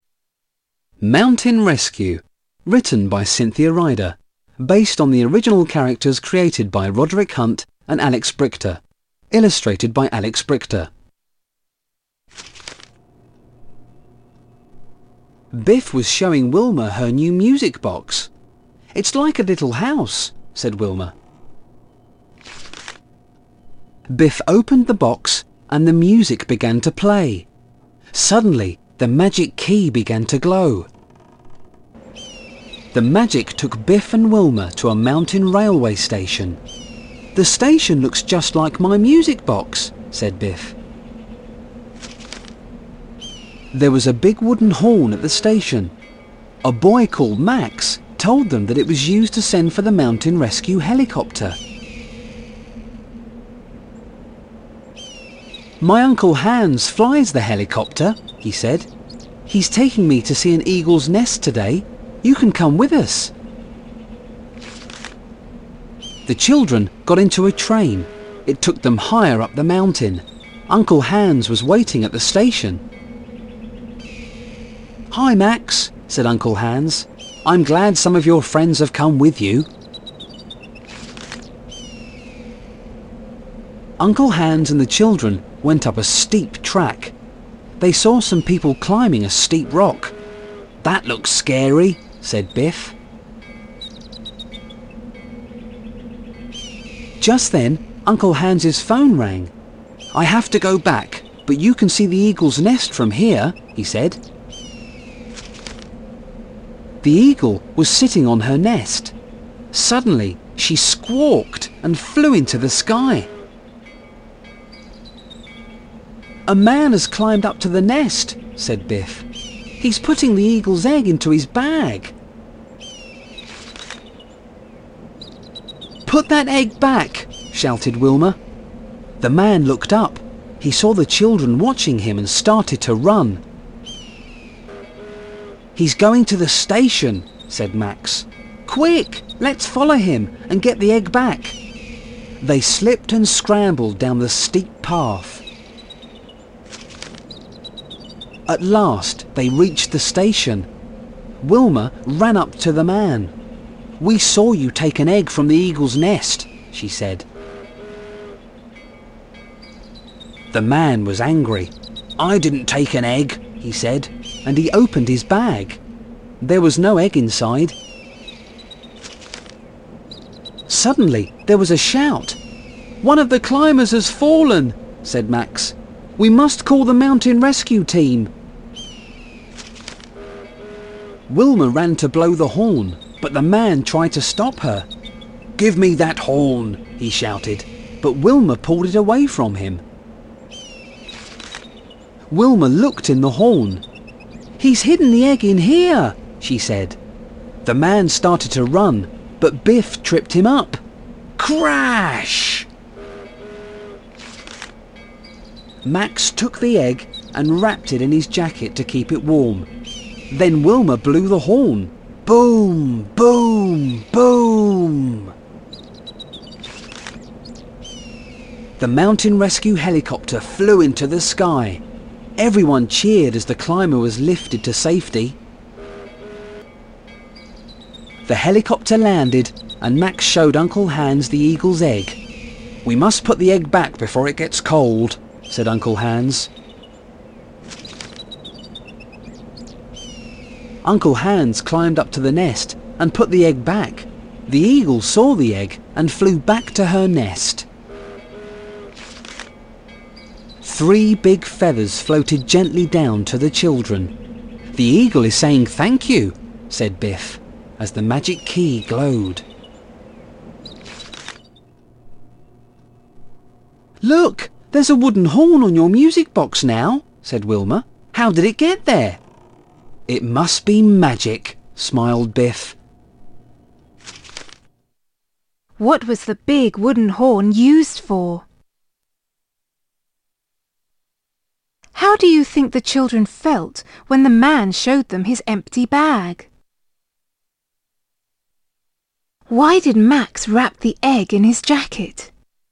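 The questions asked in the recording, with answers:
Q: What was the big wooden horn used for?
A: To send for the mountain rescue helicopter

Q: Why did Max wrap the egg in his jacket?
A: To keep it warm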